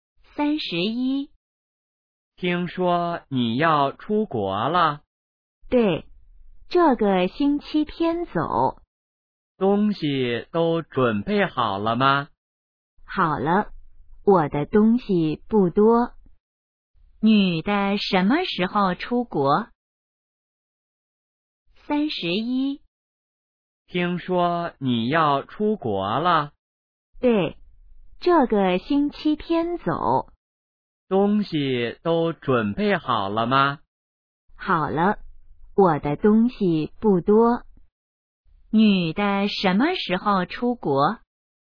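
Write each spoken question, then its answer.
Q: 女的什么时候出国?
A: 这个星期天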